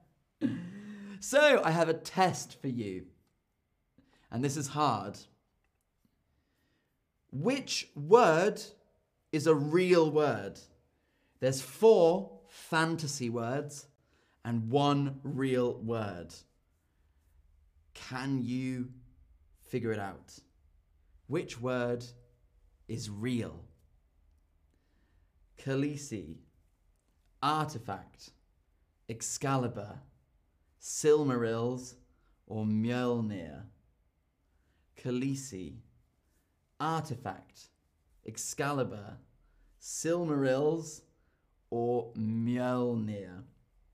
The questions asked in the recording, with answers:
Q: Which word is real?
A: Very good if you said artifact.